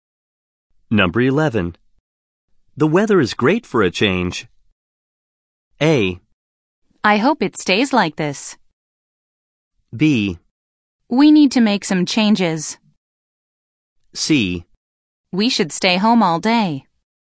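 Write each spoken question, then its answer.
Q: The weather is great for a change.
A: A: I hope it stays like this.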